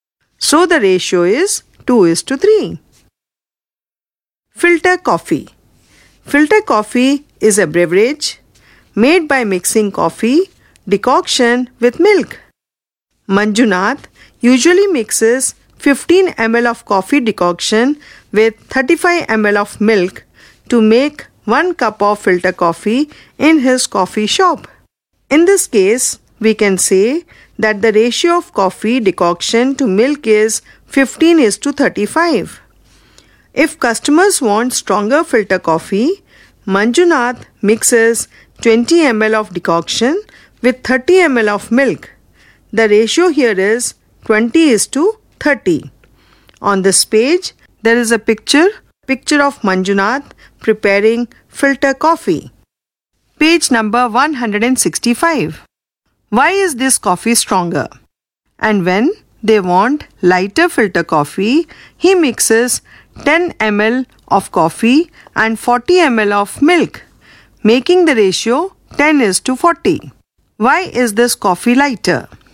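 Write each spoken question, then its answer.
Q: Why is this coffee stronger?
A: It has more decoction and less milk (20:30 instead of 15:35).

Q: Why is this coffee lighter?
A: It has less decoction and more milk (10:40 instead of 15:35).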